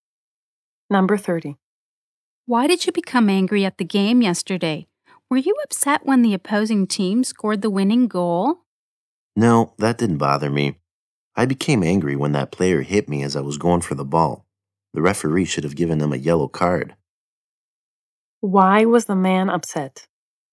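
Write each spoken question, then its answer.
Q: Why was the man upset?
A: A player hit him as he went for the ball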